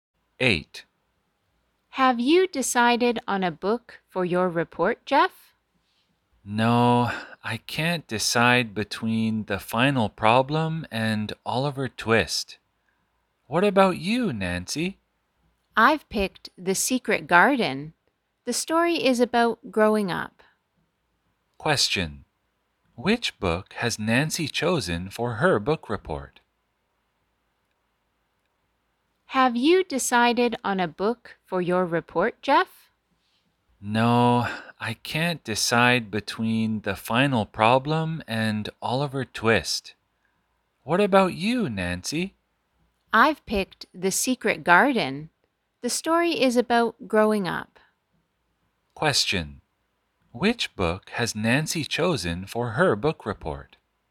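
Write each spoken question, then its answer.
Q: Which book has Nancy chosen for her book report?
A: The Secret Garden.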